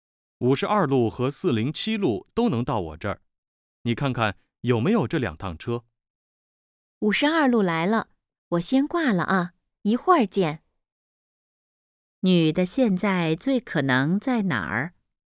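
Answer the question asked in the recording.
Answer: 公交车站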